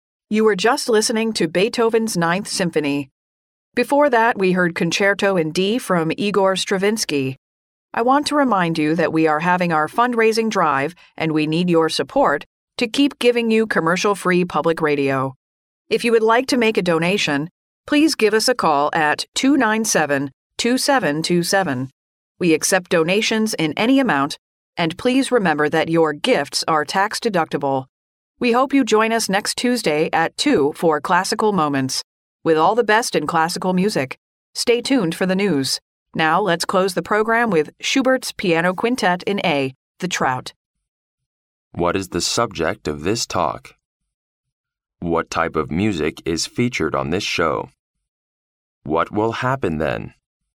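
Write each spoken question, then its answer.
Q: What type of music is featured on this show?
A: Classical music

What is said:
[听力原文] You were just listening to Beethoven's Ninth Symphony. Before that we heard Concerto in D from Igor Stravinsky. I want to remind you that we are having our fundraising drive and we need your support to keep giving you commercial-free public radio. If you would like to make a donation, please give us a call at 297-2727. We accept donations in any amount, and please remember that your gifts are tax deductible. We hope you join us next Tuesday at two for Classical Moments with all the best in classical music. Stay tuned for the news. Now, let's close the program with Schubert's Piano Quintet in A, The Trout.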